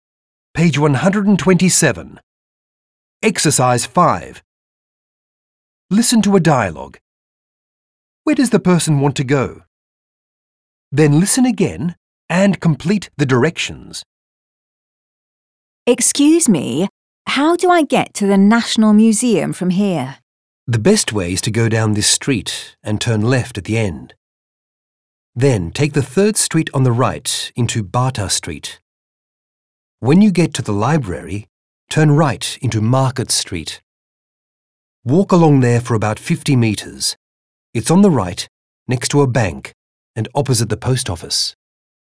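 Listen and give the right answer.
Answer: The National Museum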